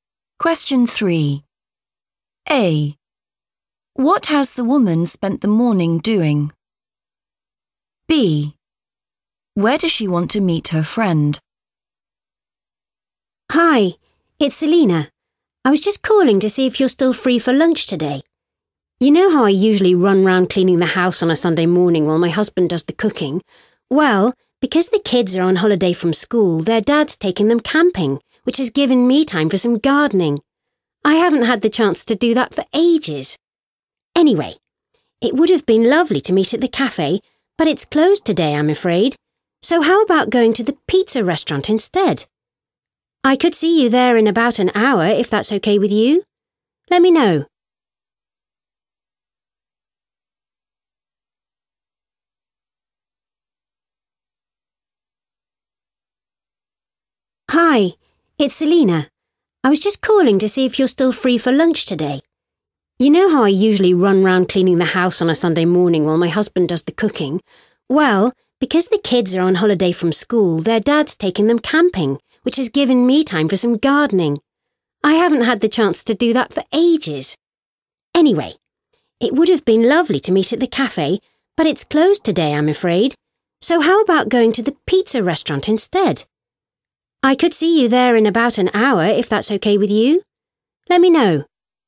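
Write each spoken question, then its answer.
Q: What has the woman spent the morning doing?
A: gardening

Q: Where does she want to meet her friend?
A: the pizza restaurant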